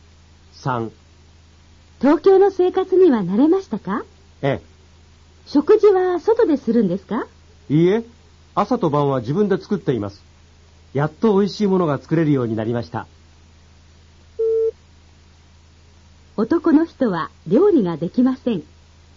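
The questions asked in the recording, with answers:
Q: 男の人は料理ができません。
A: 正しくない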